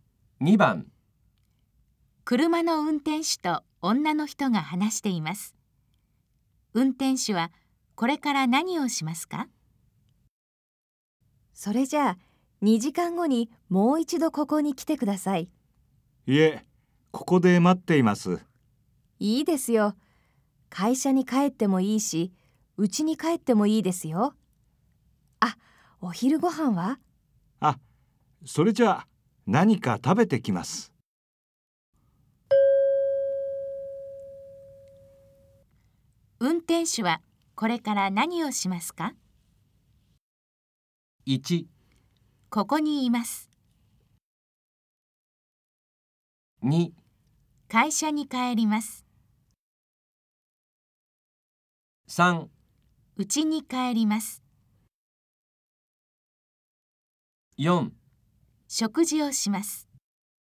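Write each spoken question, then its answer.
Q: 運転手はこれから何をしますか?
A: 4: 食事をします。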